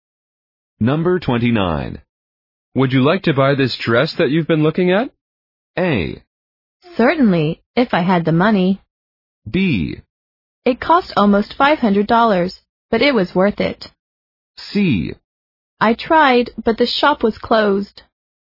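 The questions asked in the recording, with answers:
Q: Would you like to buy this dress that you've been looking at?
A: A: Certainly, if I had the money.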